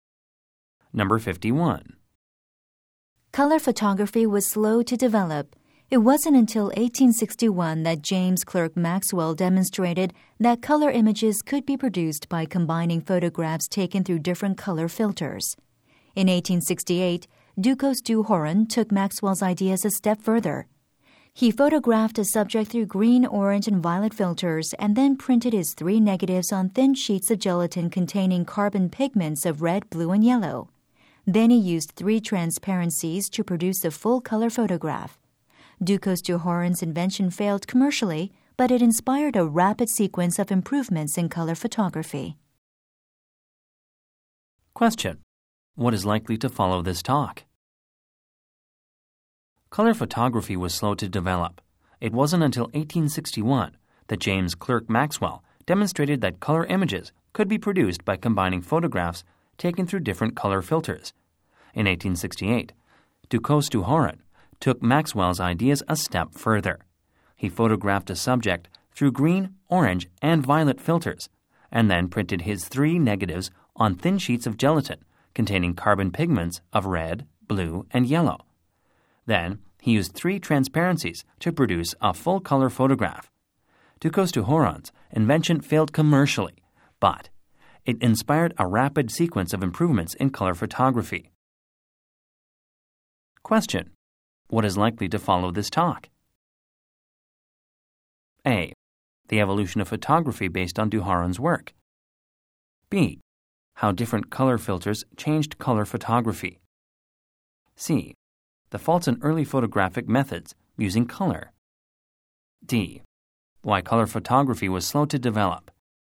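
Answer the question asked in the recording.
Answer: A: The evolution of photography based on du Horan's work.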